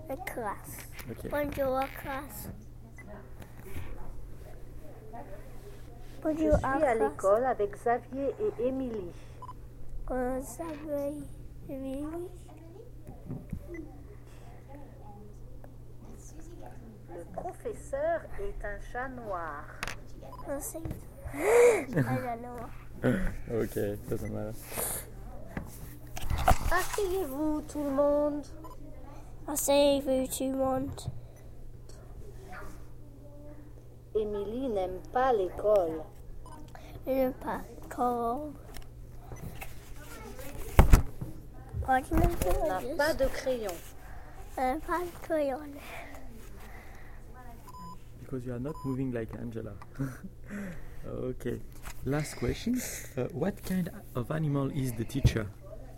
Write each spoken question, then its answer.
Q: What kind of animal is the teacher?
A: Yeah, it's a cat.